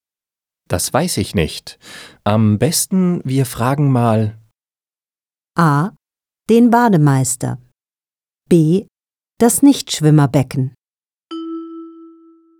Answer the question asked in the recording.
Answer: A. Am besten, wir fragen mal den Bademeister.